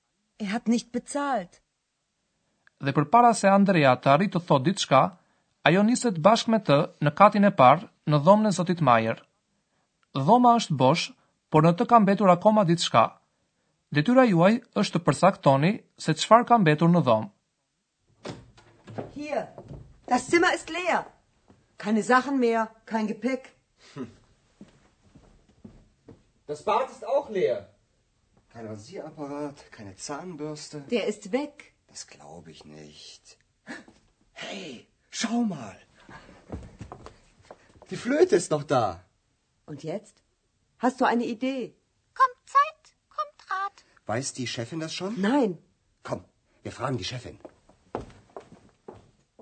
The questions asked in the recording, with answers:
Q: Detyra juaj është të përsaktoni se çfarë ka mbetur në dhomë.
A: e vetëmja gjë që ka mbetur në dhomën bosh të Zotit Majer, është flauti i ti.